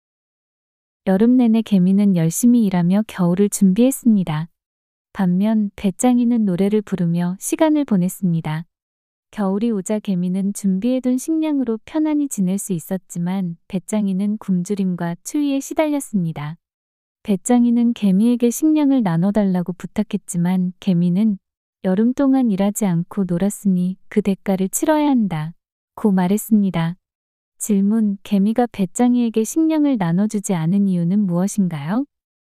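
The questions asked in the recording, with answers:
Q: 개미가 배짱이에게 식량을 나눠주지 않은 이유는 무엇인가요?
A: 배짱이가 여름 동안 일하지 않고 놀았기 때문에 그 대가를 치러야 해서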